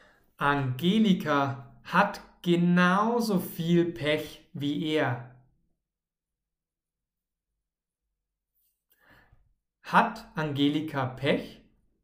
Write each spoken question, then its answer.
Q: Hat Angelika Pech?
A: Ja, sie hat Pech.